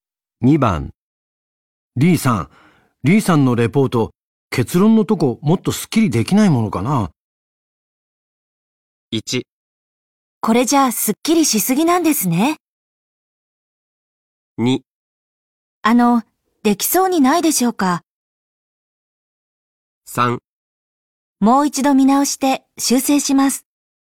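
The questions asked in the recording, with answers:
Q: リーさん、リーさんのレポート、結論のとこもっとスッキリできないも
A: 3: もう一度見直して修正します。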